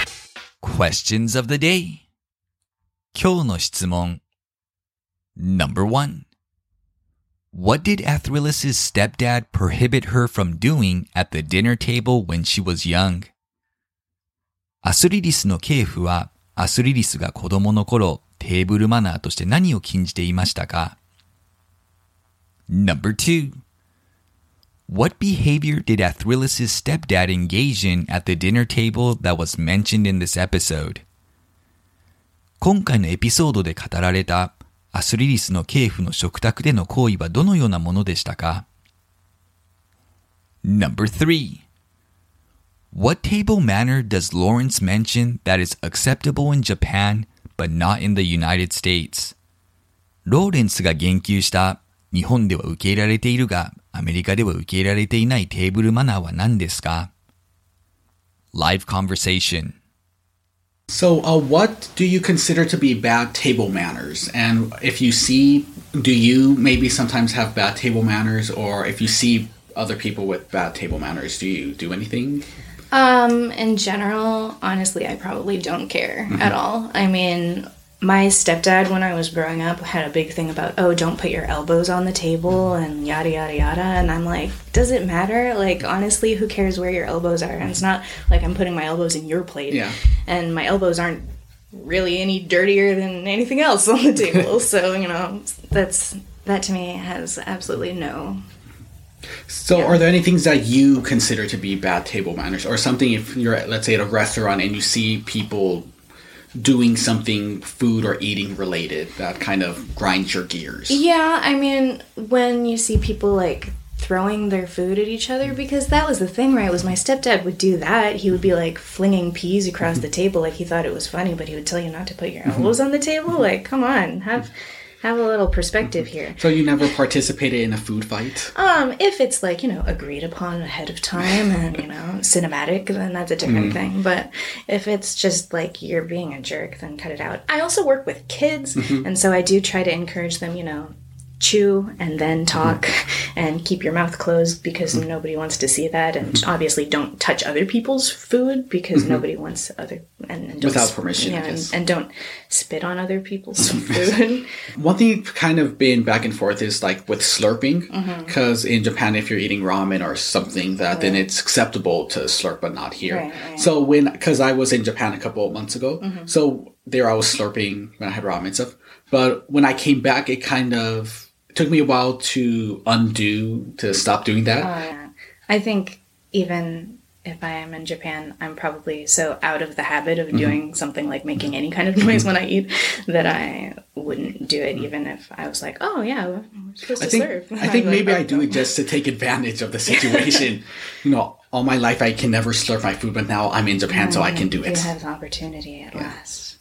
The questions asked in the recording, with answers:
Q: What did Athrillis's stepdad prohibit her from doing at the dinner table when she was young?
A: Her stepdad did not want Athrillis to put her elbows on the table.

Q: What behavior did Athrillis's stepdad engage in at the dinner table that was mentioned in this episode?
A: He would occasionally fling peas across the table.

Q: What table manner does Lawrence mention that is acceptable in Japan?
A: Slurping one's food, like with soup dishes such as ramen, is usually not acceptable in the United States, but acceptable in Japan.